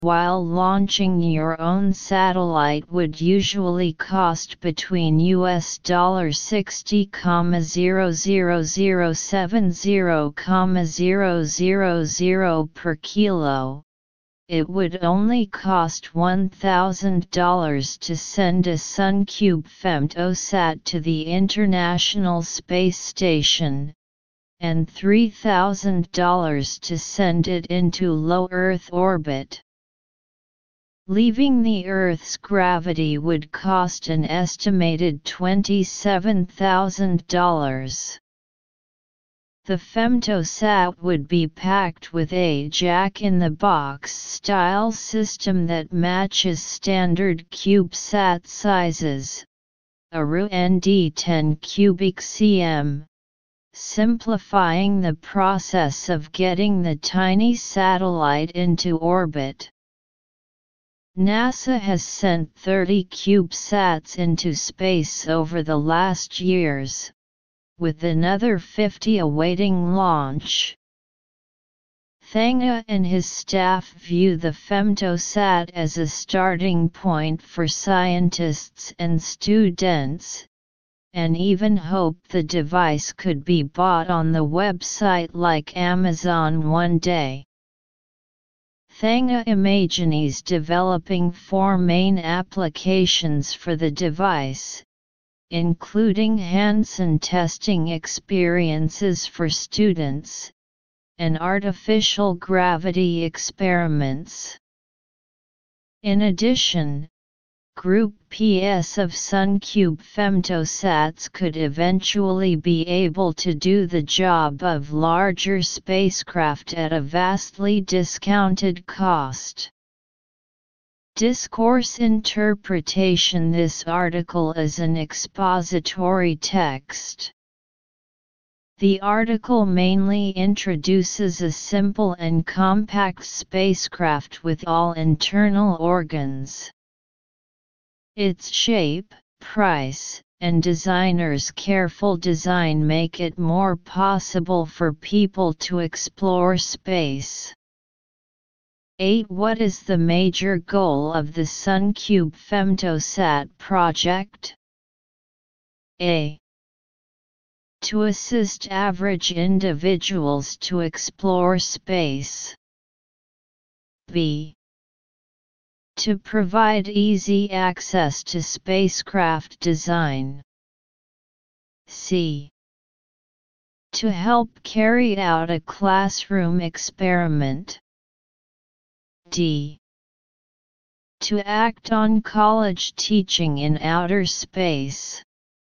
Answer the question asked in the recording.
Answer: Therefore, choose A. Answer: A.